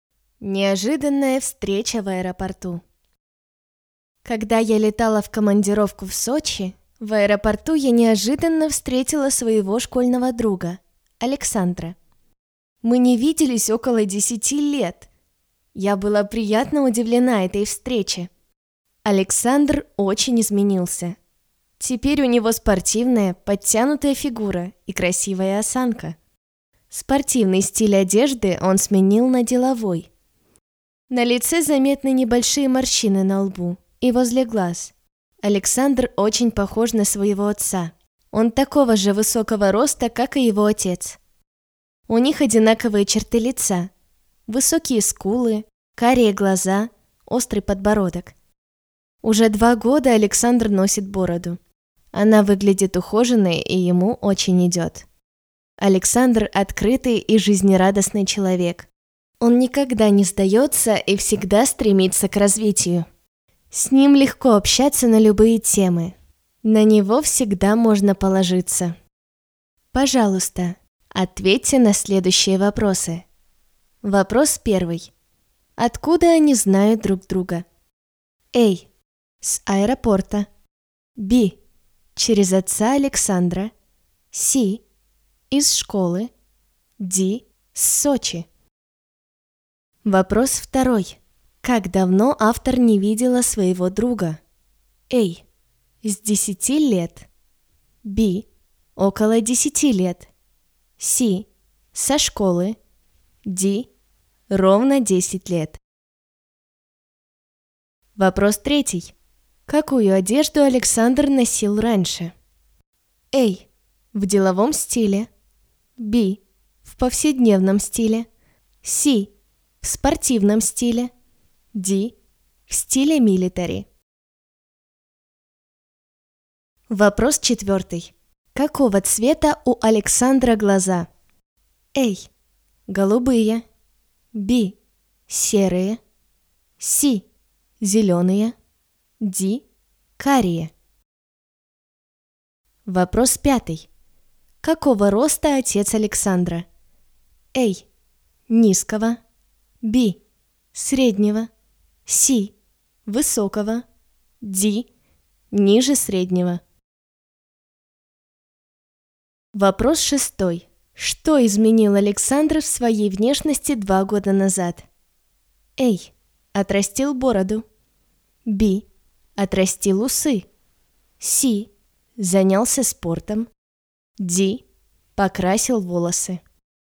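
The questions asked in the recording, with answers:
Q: Откуда они знают друг друга?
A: C: Из школы

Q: Как давно автор не видела своего друга?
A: B: Около 10 лет

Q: Какую одежду Александр носил раньше?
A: C: В спортивном стиле

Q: Какого цвета у Александра глаза?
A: D: Карие

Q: Какого роста отец Александра?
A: C: Высокого

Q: Что изменил Александр в своей внешности 2 года назад?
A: A: Отрастил бороду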